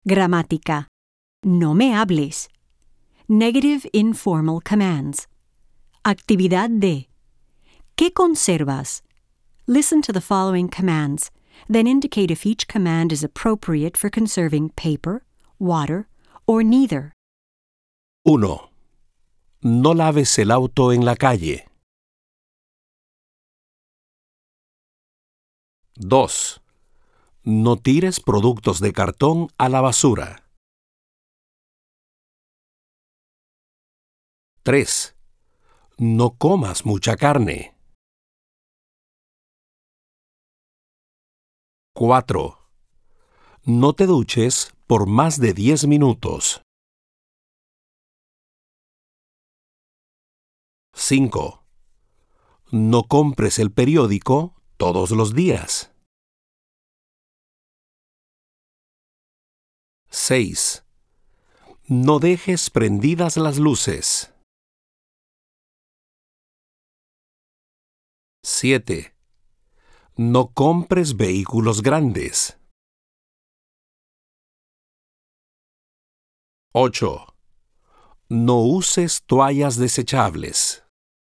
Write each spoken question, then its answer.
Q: No laves el auto en la calle.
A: Agua.

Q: No tires productos de cartón a la basura.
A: Papel.

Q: No comas mucha carne.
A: Ninguno de los dos.

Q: No te duches por más de 10 minutos.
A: Agua.

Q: No compres el periódico todos los días.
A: Papel.

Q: No dejes prendidas las luces.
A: Ninguno de los dos.

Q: No compres vehículos grandes.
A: Ninguno de los dos.

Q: No uses toallas desechables.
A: Papel.